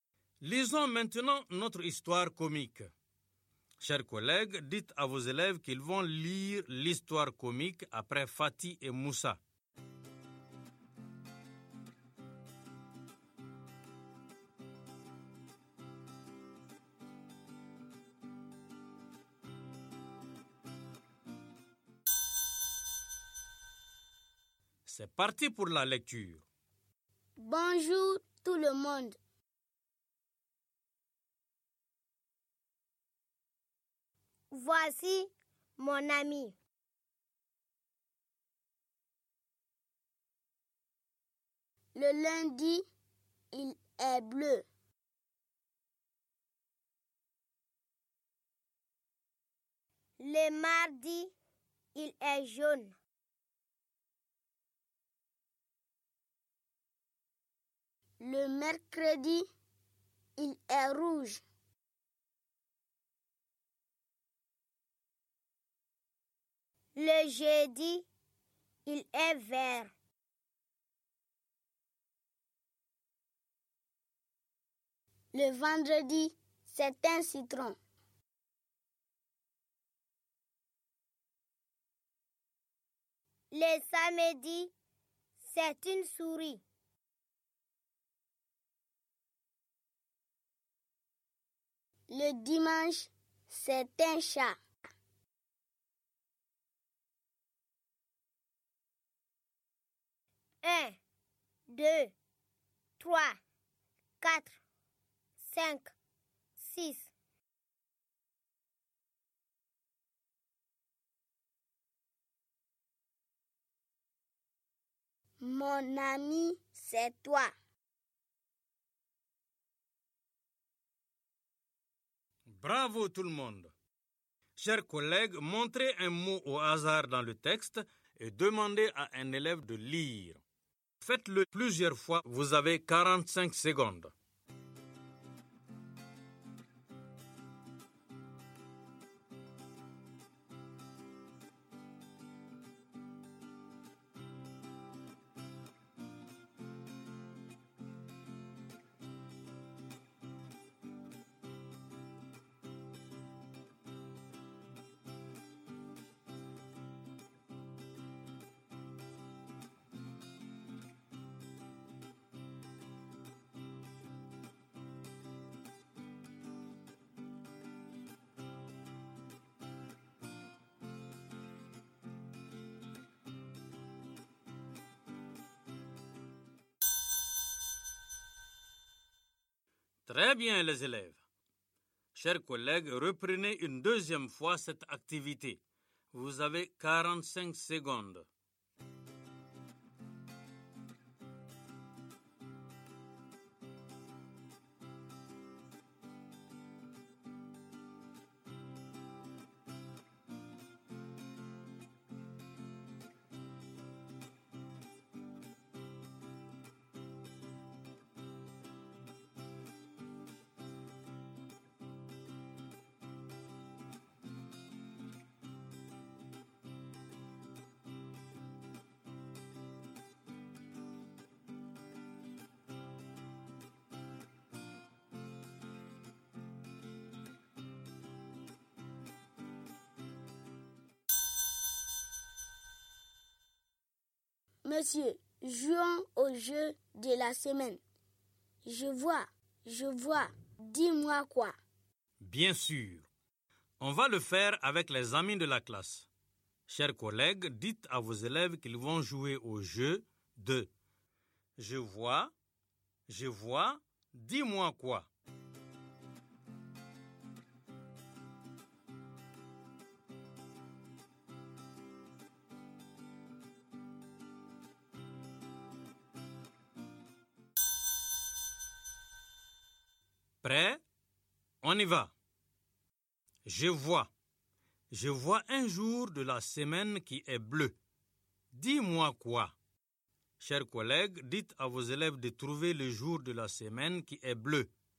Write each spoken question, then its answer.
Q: Je vois un jour de la semaine qui est bleu. Dis-moi quoi?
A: C'est lundi.